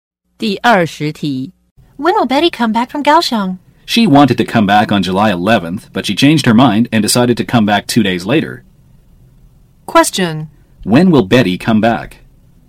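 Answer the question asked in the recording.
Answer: July 13th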